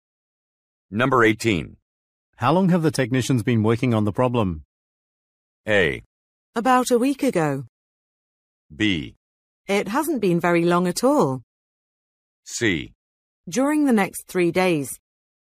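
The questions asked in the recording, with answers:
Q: How long have the technicians been working on the problem?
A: B: It hasn't been very long at all.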